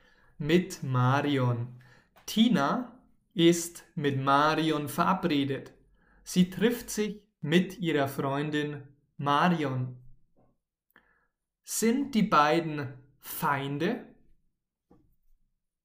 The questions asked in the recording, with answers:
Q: Sind die beiden Feinde?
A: Nein, die beiden sind keine Feinde, sie sind Freunde, Freundinnen.